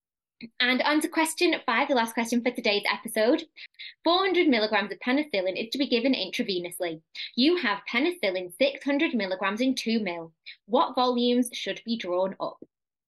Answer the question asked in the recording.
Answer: 1.3 recurring mils to draw up